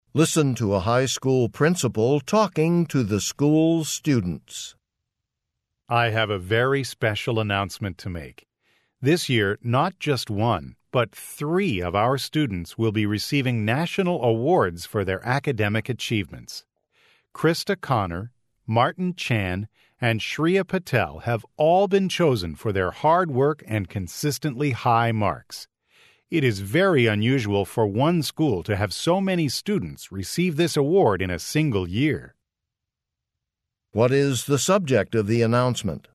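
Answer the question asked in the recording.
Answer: Three of the school's students are receiving national awards for academic achievement.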